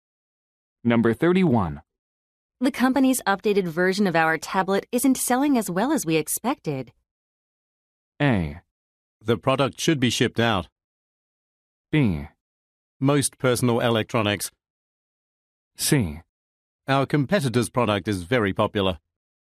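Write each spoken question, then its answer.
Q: The company's updated version of our tablet isn't selling as well as we expected.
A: C: Our competitor's product is very popular.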